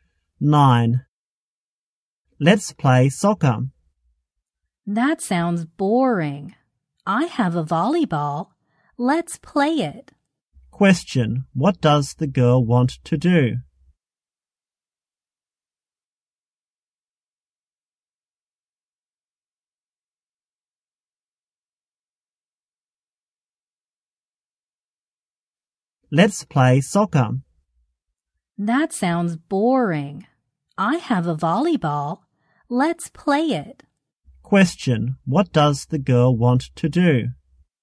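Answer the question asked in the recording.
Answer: Play volleyball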